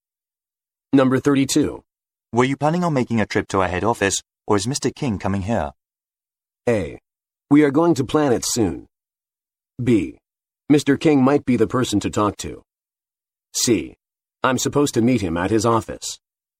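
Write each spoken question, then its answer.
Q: Were you planning on making a trip to our head office, or is Mr. King coming here?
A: C: I'm supposed to meet him at his office.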